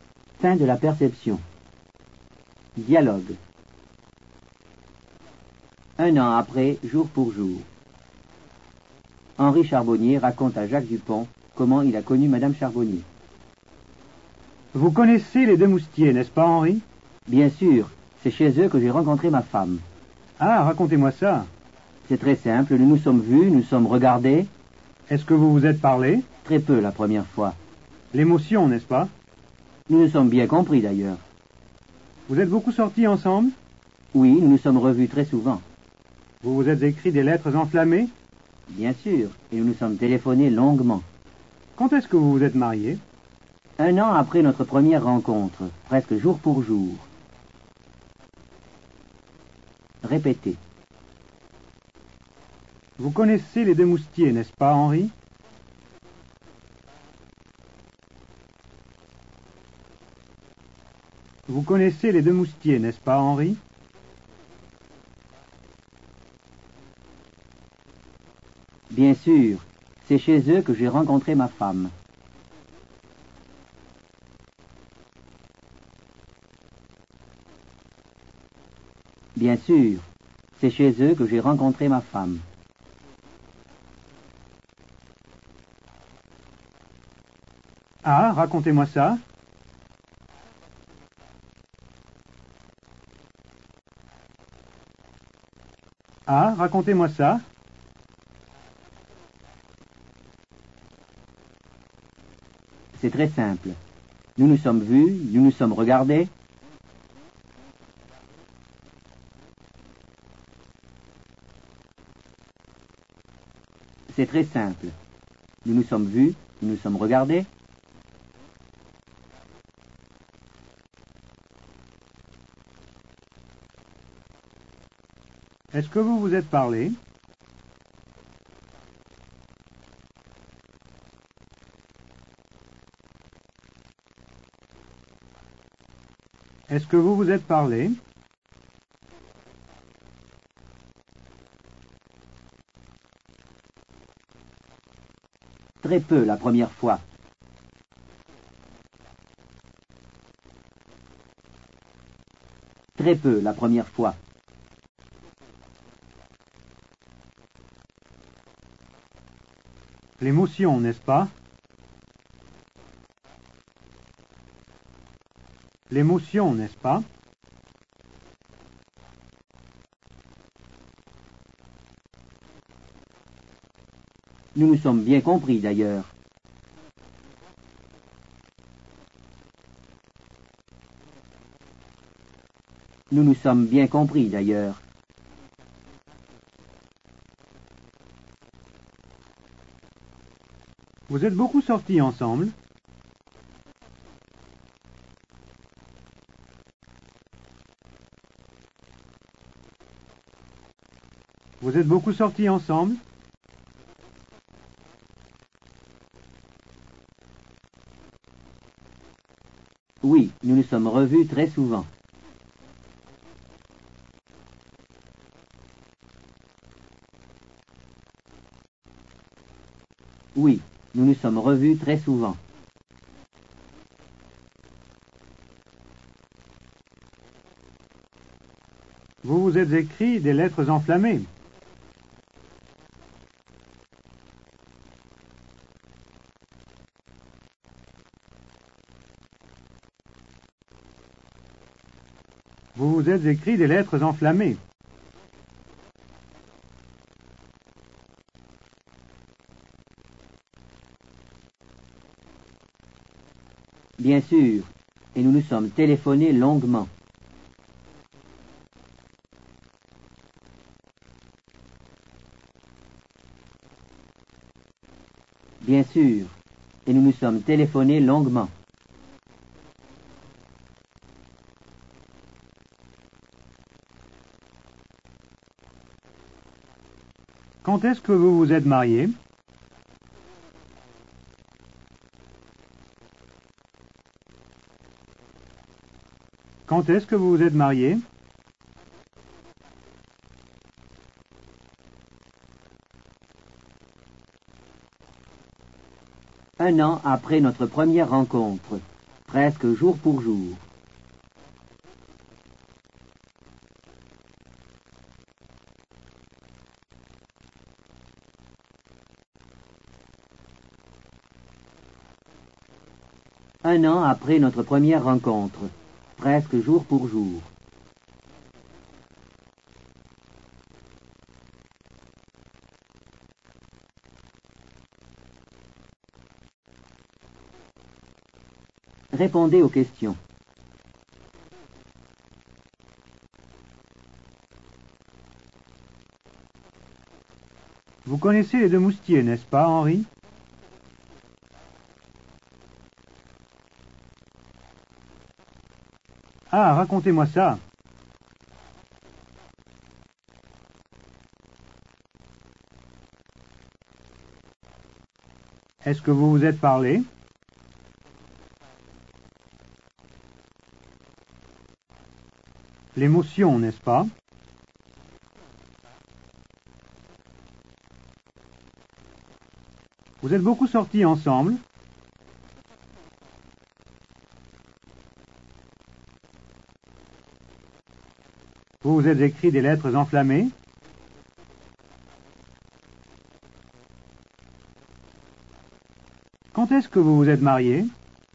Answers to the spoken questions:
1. Bien sûr, c'est chez eux que j'ai rencontré ma femme.
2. Très peu la première fois.
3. Oui, nous nous sommes revus très souvent.
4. Bien sûr, et nous nous sommes téléphonés longuement.
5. Un an après notre première rencontre, presque jour pour jour.